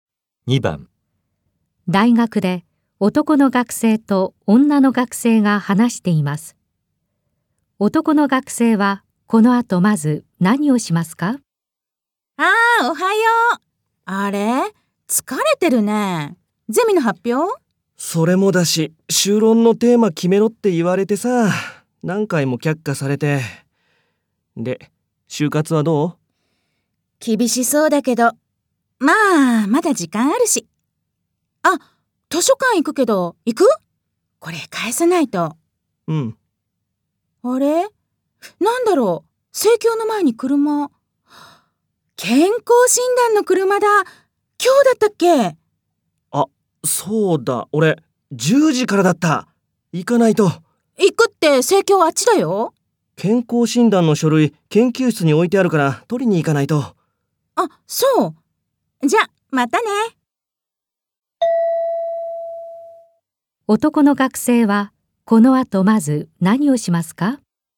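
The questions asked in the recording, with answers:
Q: 男の学生は、この後まず何をしますか?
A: 研究室に健康診断の書類を取りに行く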